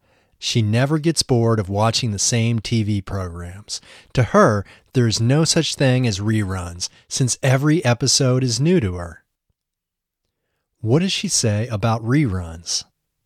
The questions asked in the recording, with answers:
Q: What does she say about reruns?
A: She says that there is no such thing as a rerun, as every episode is new to her.